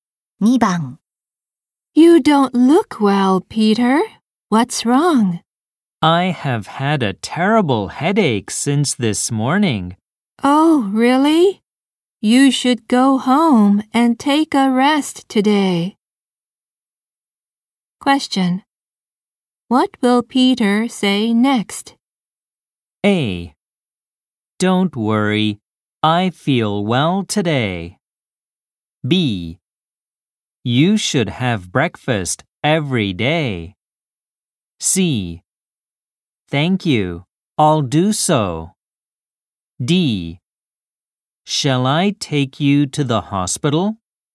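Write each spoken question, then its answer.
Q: What will Peter say next?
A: C: Thank you, I'll do so.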